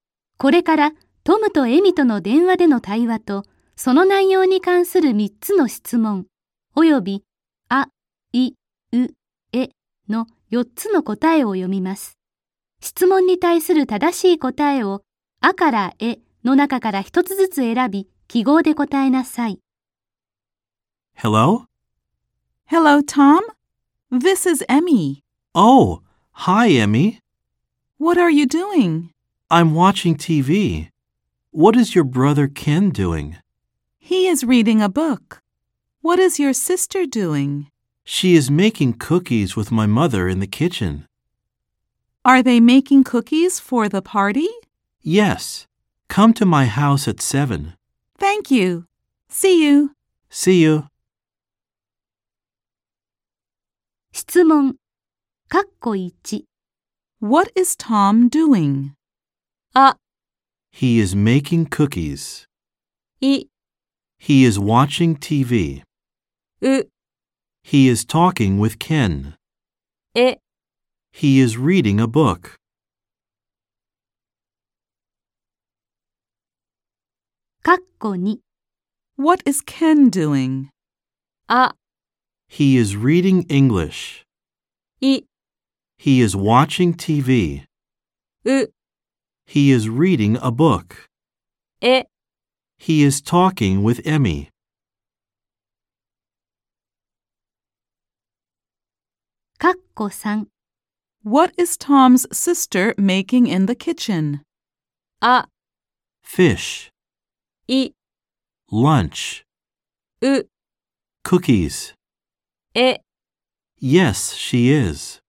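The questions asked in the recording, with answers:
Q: What is Tom doing?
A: い: He is watching TV.

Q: What is Ken doing?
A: う: He is reading a book.

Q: What is Tom's sister making in the kitchen?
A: う: Cookies.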